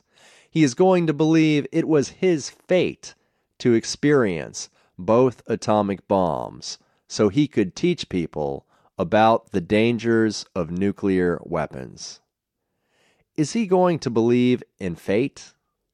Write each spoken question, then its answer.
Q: Is he going to believe in fate?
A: Yes, he is going to believe it was his fate to experience both atomic bombs.